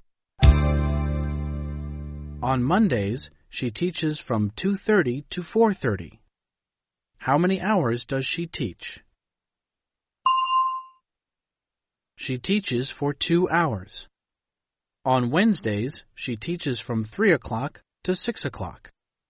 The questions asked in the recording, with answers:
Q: How many hours does she teach?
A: She teaches for 3 hours.